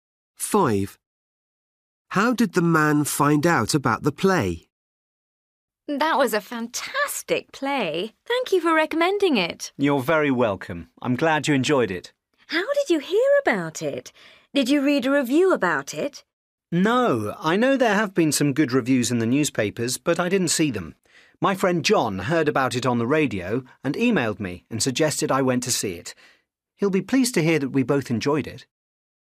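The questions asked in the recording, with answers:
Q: How did the man find out about the play?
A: from his friend John's email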